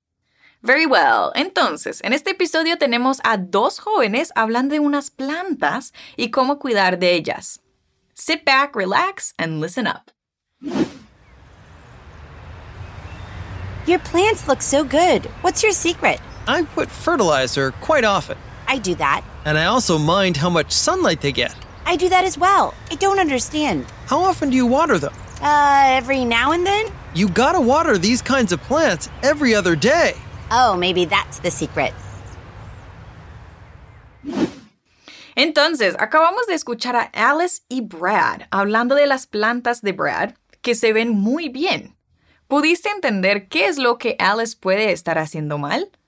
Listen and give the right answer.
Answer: Brad le dice a Alice que este tipo de plantas se tienen que regar más seguido.